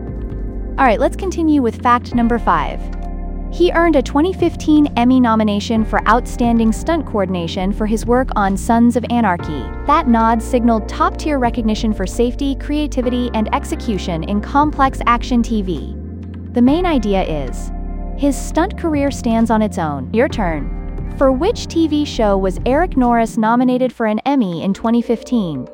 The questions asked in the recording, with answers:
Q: For which TV show was Eric Norris nominated for an Emmy in 2015?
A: Sons of Anarchy.